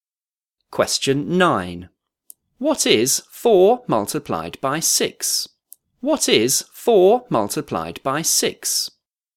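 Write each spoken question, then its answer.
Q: What is 4 multiplied by 6?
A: 24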